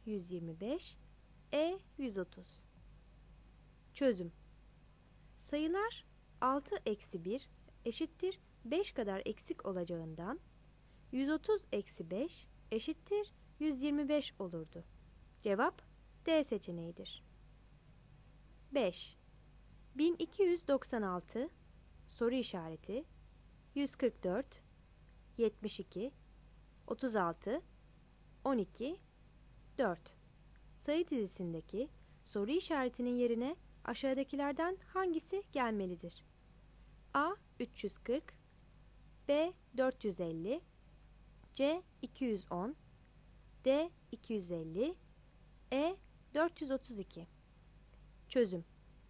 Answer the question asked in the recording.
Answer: Cevap E seçeneğidir.